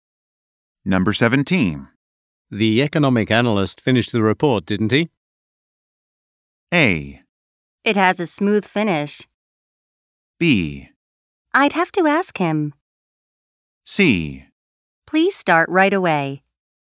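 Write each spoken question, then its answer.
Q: The economic analyst finished the report, didn't he?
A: B: I'd have to ask him.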